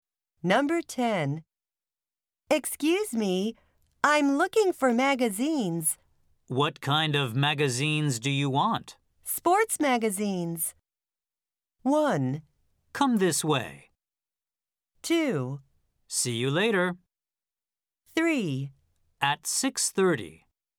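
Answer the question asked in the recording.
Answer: 1: Come this way.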